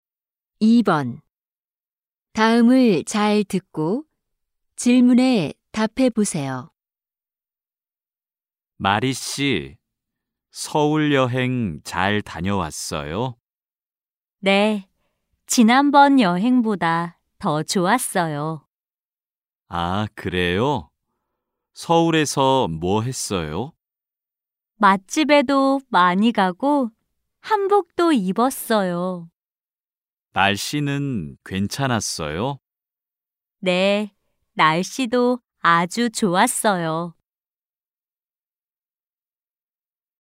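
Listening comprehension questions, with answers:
[16-1~16-2] 다음을 잘 듣고 질문에 답해 보세요.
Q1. 마리 씨는 어디에 여행을 갔어요?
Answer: 서울

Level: 1B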